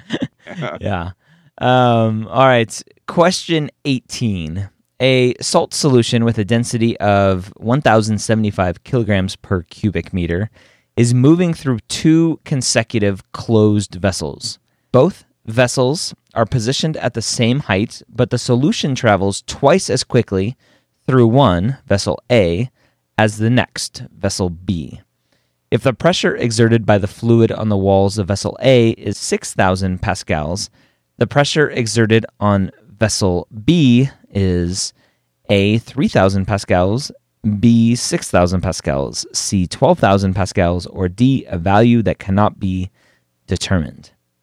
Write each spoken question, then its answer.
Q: If the pressure exerted by the fluid on the walls of vessel A is 6,000 pascals, the pressure exerted on vessel B is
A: in fact, D is the right answer.